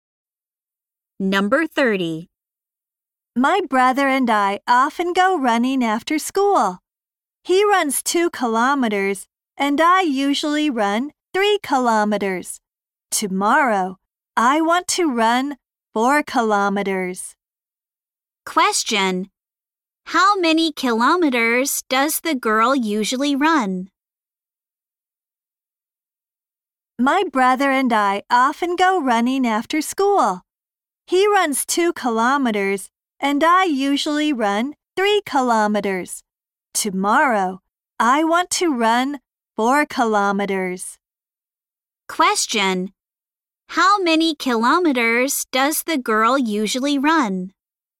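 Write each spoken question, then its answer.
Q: How many kilometers does the girl usually run?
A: 3 kilometers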